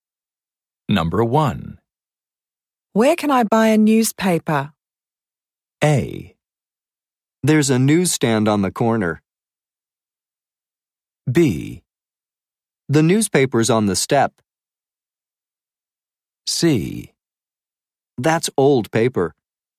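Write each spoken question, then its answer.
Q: Where can I buy a newspaper?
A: A: There's a newsstand on the corner.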